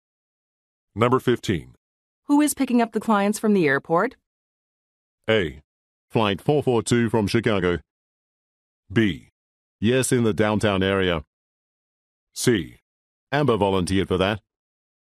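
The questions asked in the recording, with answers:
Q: Who is picking up the clients from the airport?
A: C: Amber volunteered for that.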